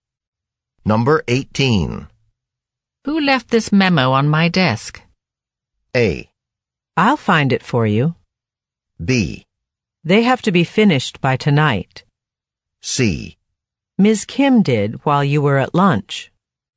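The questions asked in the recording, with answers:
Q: Who left this memo on my desk?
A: C: Ms. Kim did while you were at lunch.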